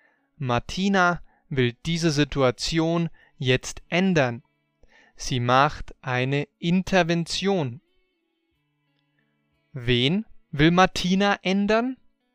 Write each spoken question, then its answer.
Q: Wen will Martina ändern?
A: Diese Situation. Martina will diese Situation jetzt ändern.